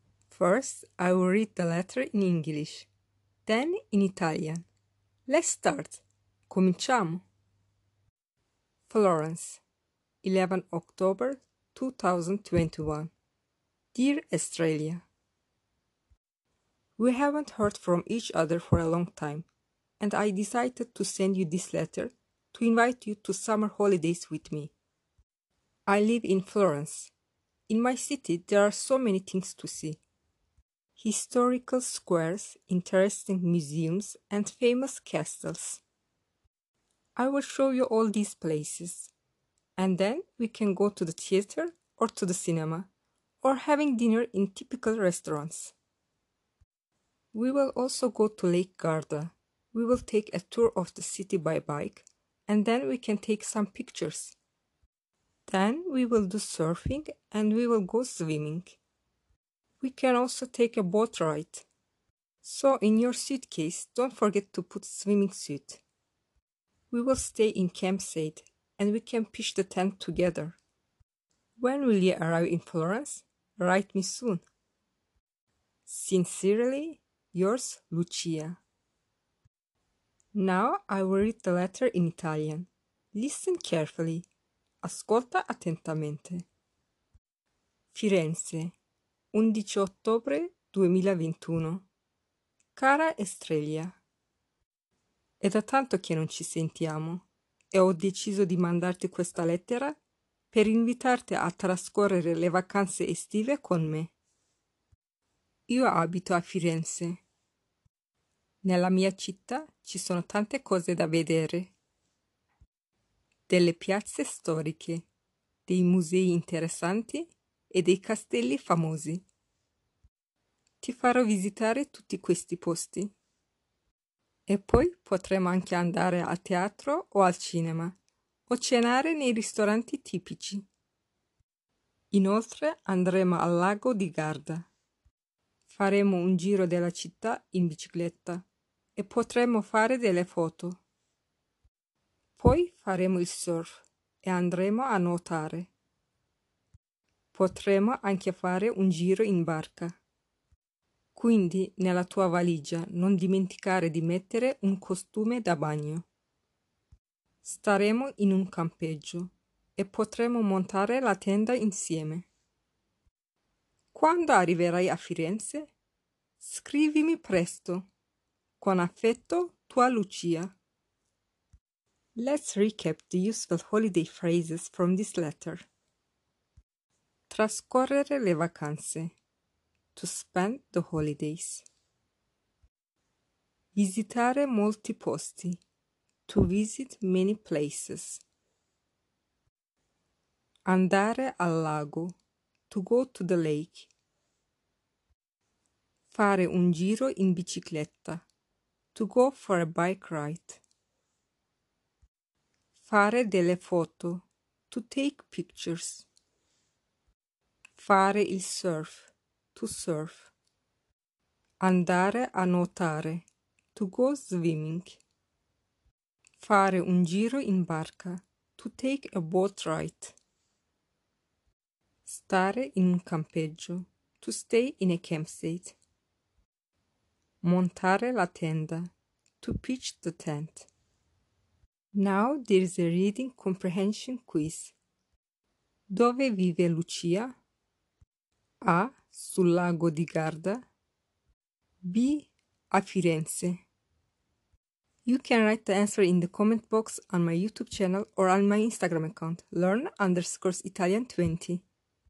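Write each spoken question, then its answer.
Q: Dove vive Lucia?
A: B: A Firenze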